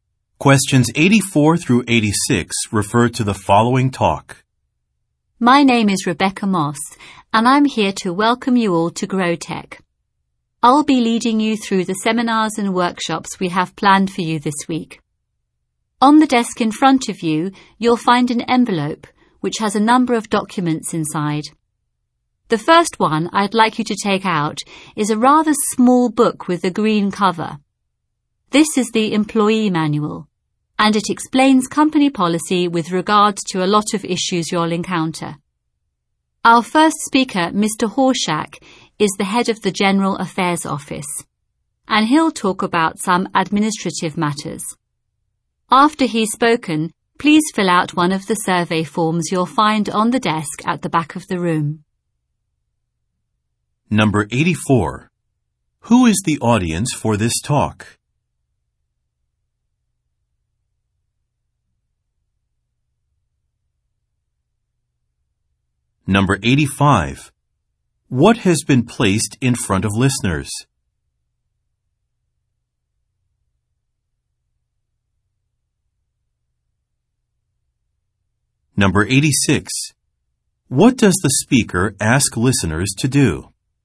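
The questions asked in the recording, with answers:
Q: What has been placed in front of listeners?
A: An envelope with documents inside

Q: What does the speaker ask listeners to do?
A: Fill out a survey form after the first speaker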